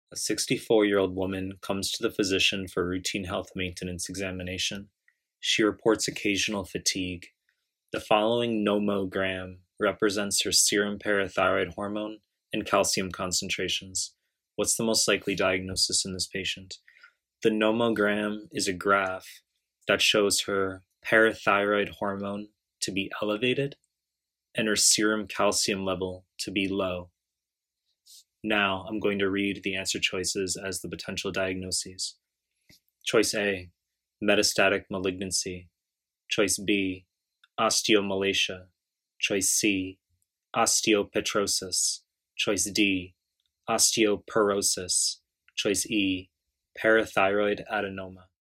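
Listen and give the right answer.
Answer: B: osteomalacia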